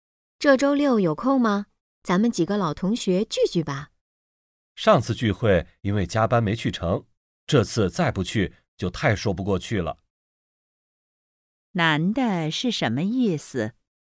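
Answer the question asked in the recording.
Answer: 这次一定会去参加聚会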